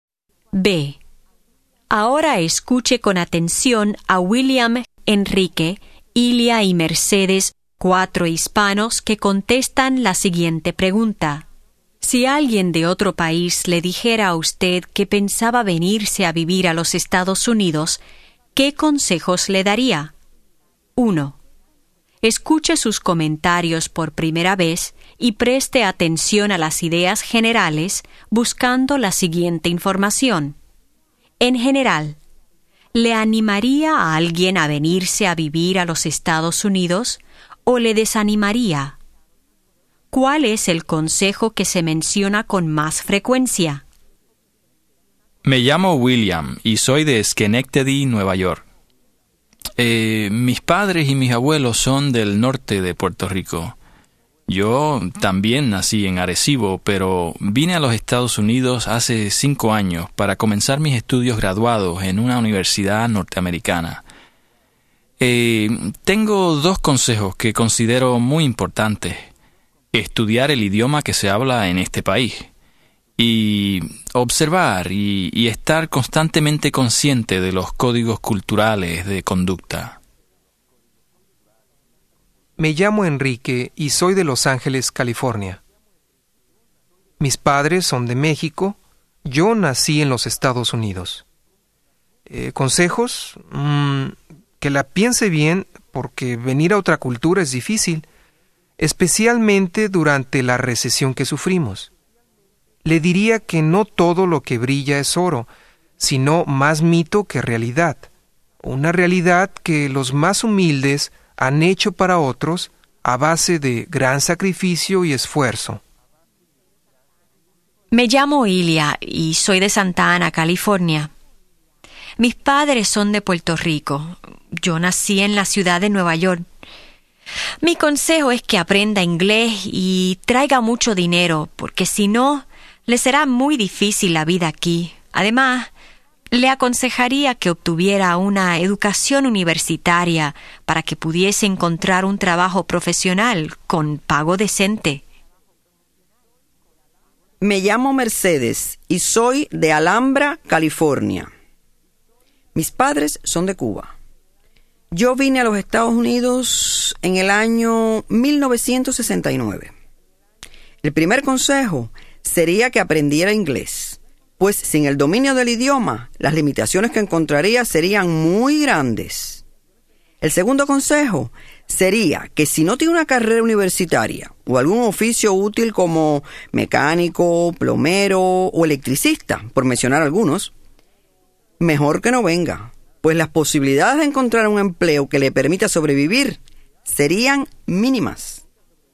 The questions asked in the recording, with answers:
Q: ¿Cuál es el consejo que se menciona con más frecuencia?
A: El consejo que se menciona con más frecuencia es aprender el inglés.